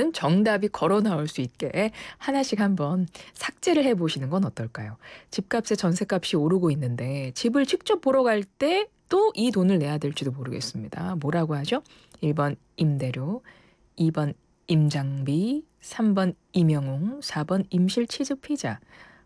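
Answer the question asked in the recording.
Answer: 2: 임장비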